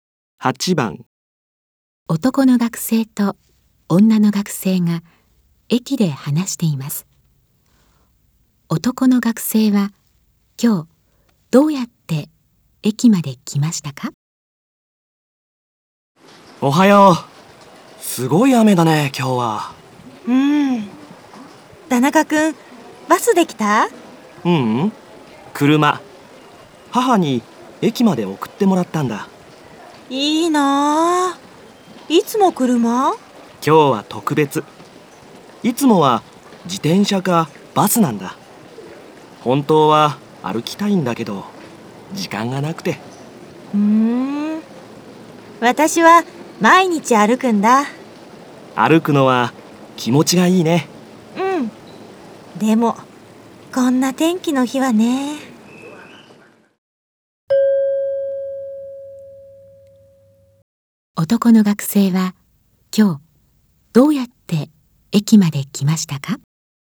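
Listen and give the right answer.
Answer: 車(母に送ってもらった)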